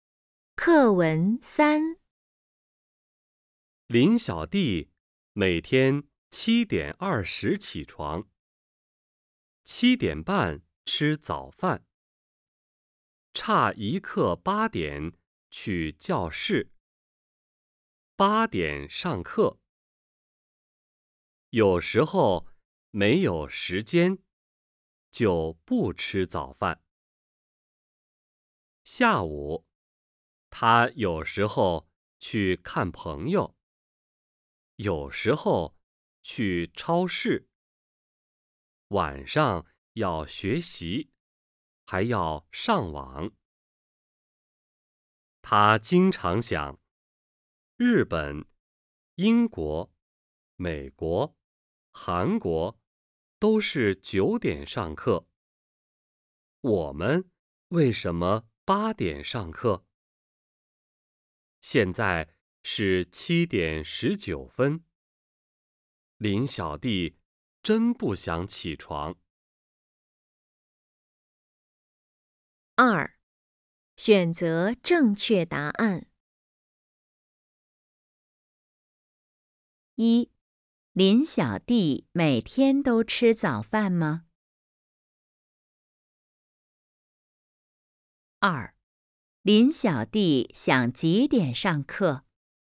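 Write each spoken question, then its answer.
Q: 林小弟每天都吃早饭吗?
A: 不是,有时候没有时间就不吃早饭

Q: 林小弟想几点上课?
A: 9点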